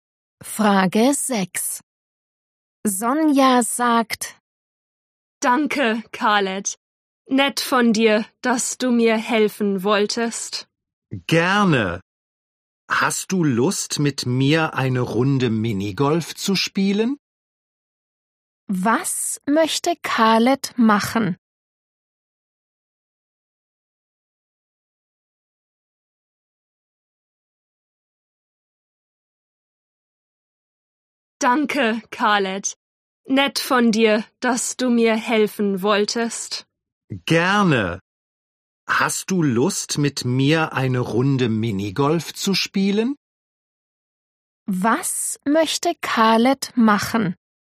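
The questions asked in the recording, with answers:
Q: Was möchte Khaled machen?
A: Minigolf spielen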